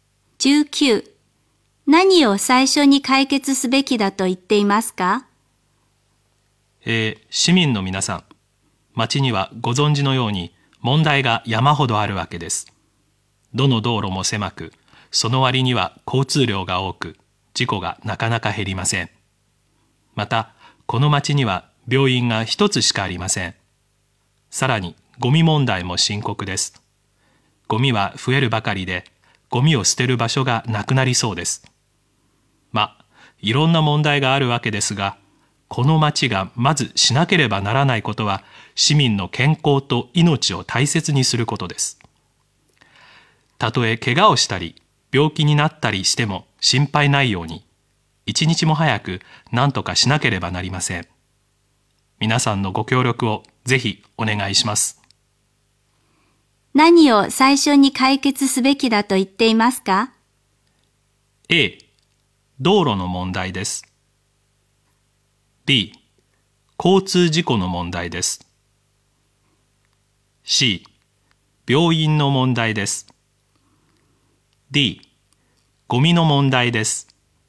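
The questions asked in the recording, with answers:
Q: 何を最初に解決すべきだと言っていますか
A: C: 病院の問題です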